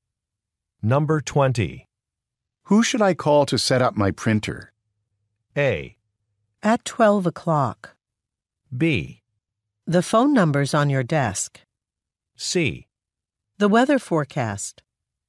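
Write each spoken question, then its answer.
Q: Who should I call to set up my printer?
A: B: The phone number's on your desk.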